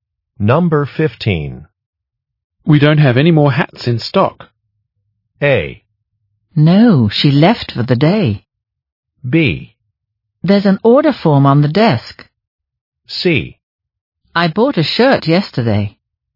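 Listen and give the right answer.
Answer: B: There's an order form on the desk.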